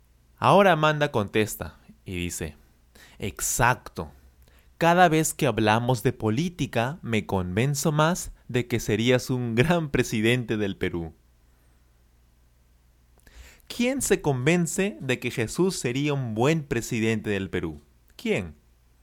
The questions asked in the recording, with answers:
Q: ¿Quién se convence de que Jesús sería un buen presidente del Perú?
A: Amanda. Amanda se convence de que Jesús sería un buen presidente del Perú.